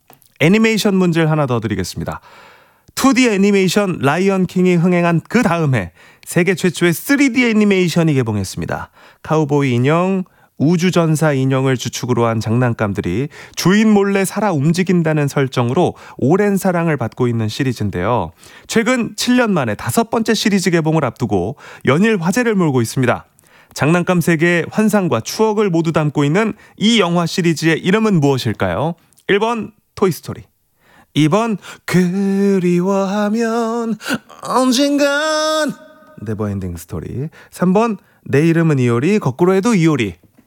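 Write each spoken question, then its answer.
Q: 장난감 세계의 환상과 추억을 모두 담고 있는 이 영화 시리즈의 이름은 무엇일까요?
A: 1번: 토이스토리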